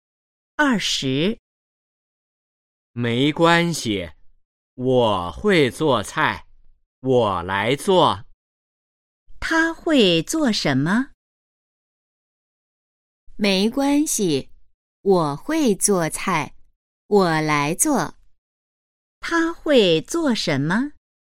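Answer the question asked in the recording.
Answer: 做菜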